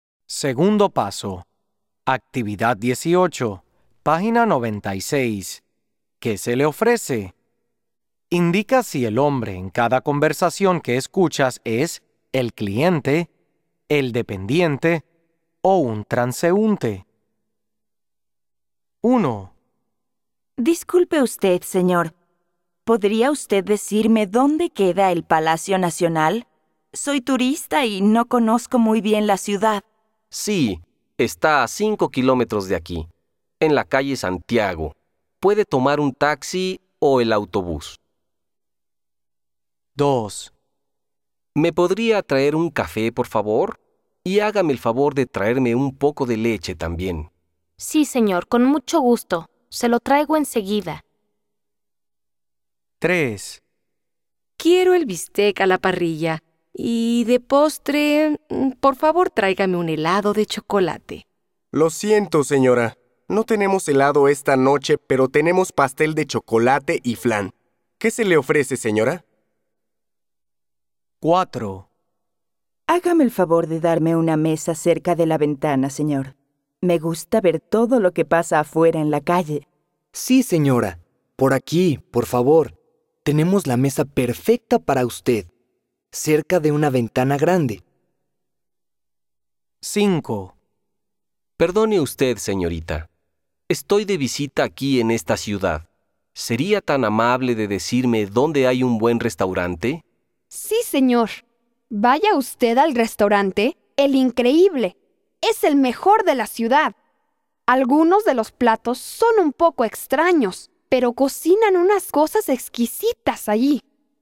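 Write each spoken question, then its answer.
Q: Indica si el hombre en cada conversación que escuchas es el cliente, el dependiente o un transeúnte.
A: un transeúnte

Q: Indica si el hombre en cada conversación que escuchas es el cliente, el dependiente o un transeúnte.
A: el cliente

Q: Indica si el hombre en cada conversación que escuchas es el cliente, el dependiente o un transeúnte.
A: el dependiente

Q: Indica si el hombre en cada conversación que escuchas es el cliente, el dependiente o un transeúnte.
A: el dependiente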